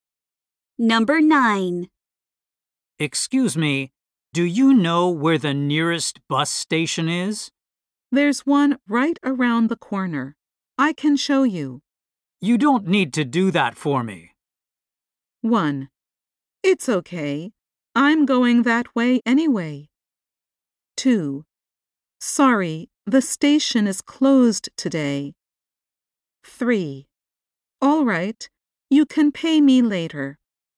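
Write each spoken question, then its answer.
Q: You don't need to do that for me.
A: 1: It's okay. I'm going that way anyway.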